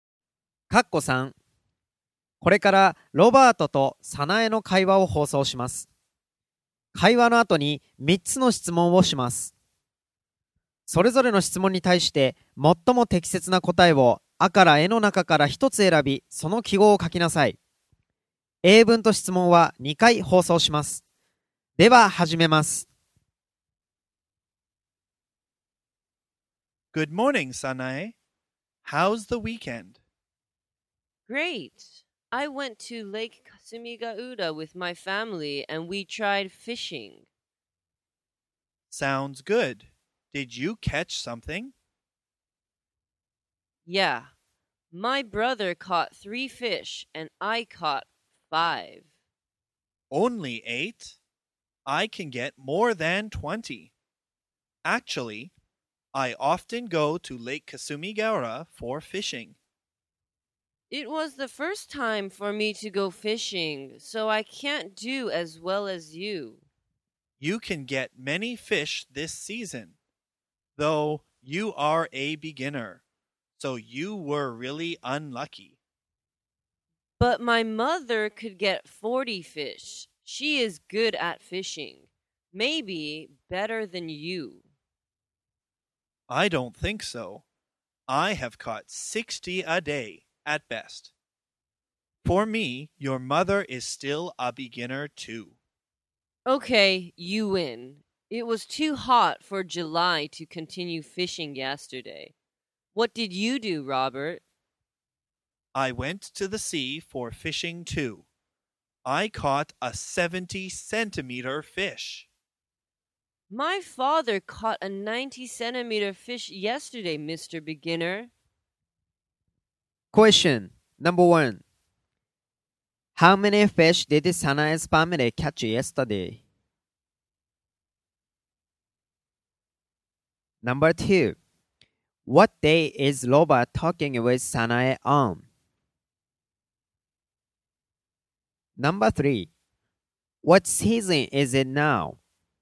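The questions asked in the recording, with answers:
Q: How many fish did Sanae's family catch yesterday?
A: 48 fish

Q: What season is it now?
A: Summer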